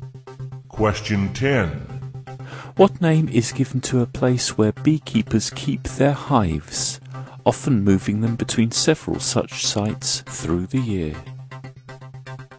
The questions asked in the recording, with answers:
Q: What name is given to a place where beekeepers keep their hives, often moving them between several such sites through the year?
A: the place where beehives are kept is called an apiary